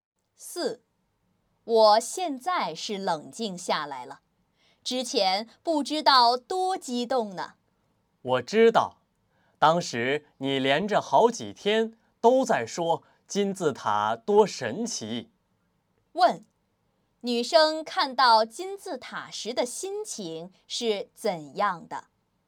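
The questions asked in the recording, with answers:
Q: 女生看到金字塔时的心情是怎样的?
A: 很激动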